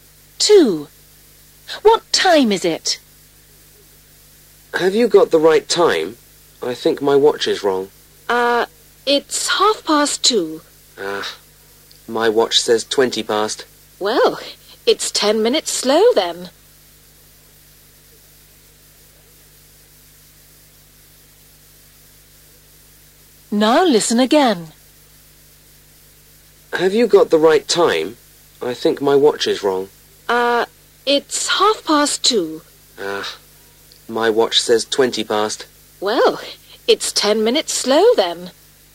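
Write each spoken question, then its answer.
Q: What time is it?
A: 2:30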